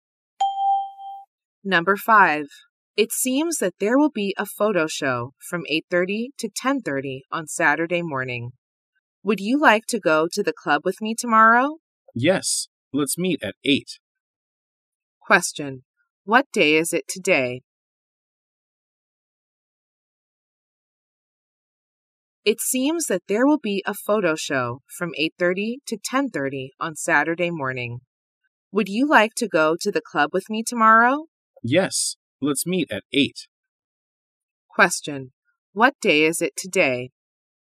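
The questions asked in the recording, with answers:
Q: What day is it today?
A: Friday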